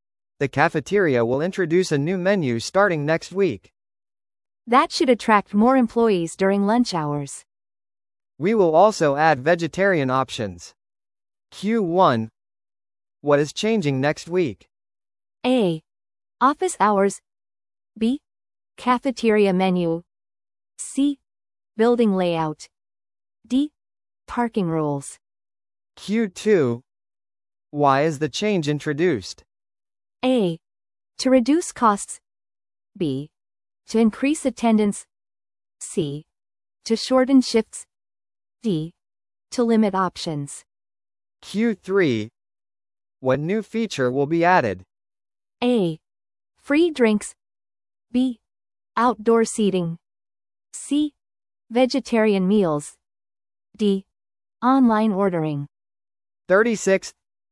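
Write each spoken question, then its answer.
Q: What is changing next week?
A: B: Cafeteria menu.

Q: Why is the change introduced?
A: B: To increase attendance.

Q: What new feature will be added?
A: C: Vegetarian meals.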